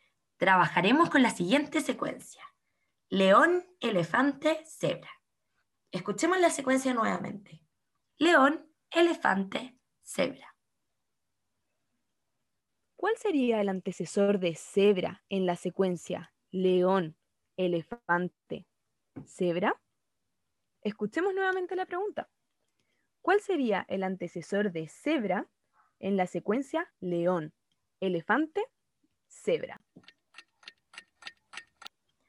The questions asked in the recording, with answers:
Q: ¿Cuál sería el antecesor de cebra en la secuencia león, elefante, cebra?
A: La respuesta correcta es elefante